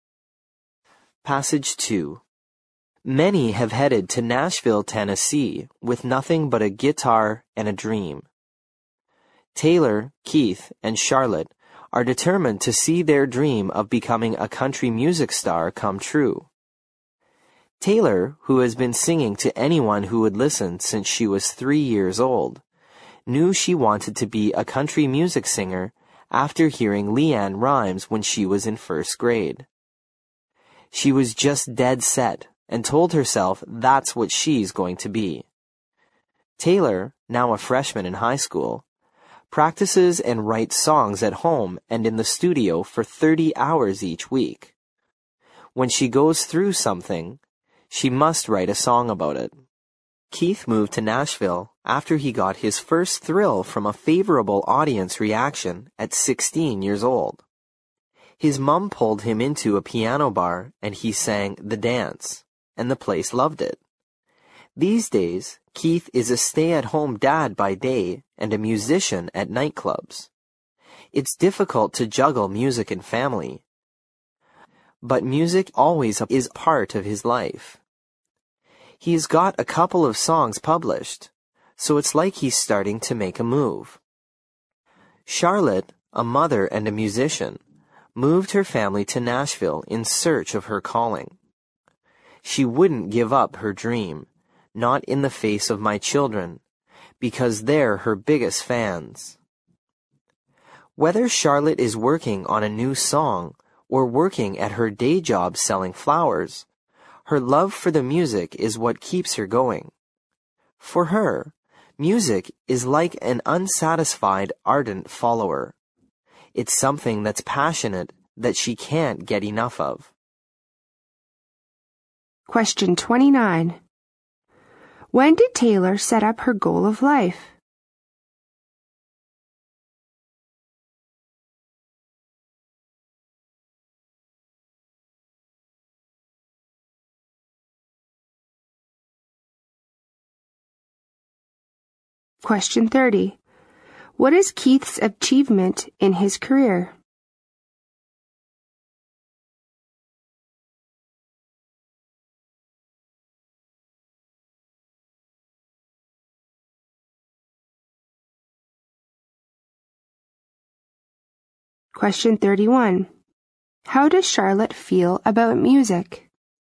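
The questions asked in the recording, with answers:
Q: What is Keith's achievement in his career?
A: He has had a couple of songs published

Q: How does Charlotte feel about music?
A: She is passionate about it and can't get enough of it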